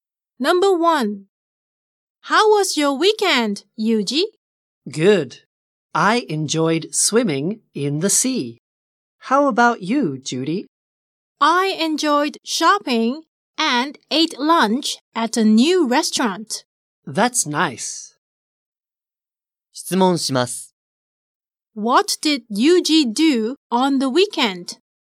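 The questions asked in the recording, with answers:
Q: What did Yuji do on the weekend?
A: He went swimming in the sea.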